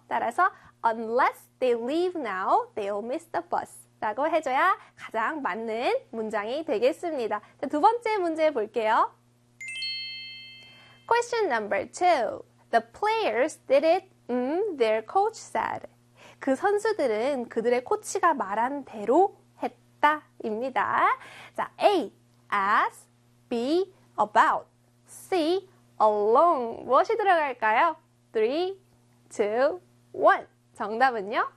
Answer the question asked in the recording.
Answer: 네, 맞습니다. A에 as를 써주셔야 되죠.